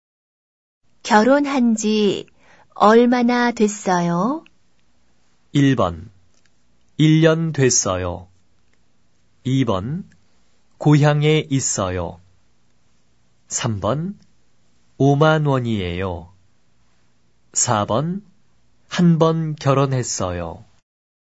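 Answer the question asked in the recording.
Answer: 1: 1년 됐어요.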